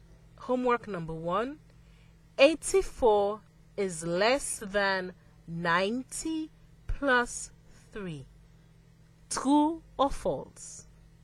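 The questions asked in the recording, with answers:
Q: Homework number one 84 is less than 90 plus 3 true or false.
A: True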